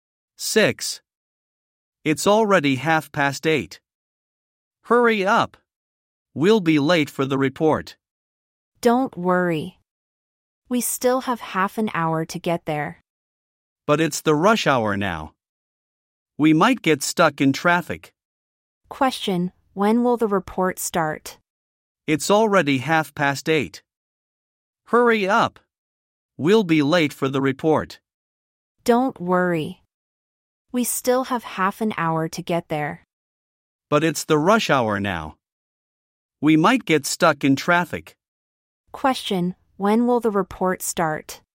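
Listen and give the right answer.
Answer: At 9:00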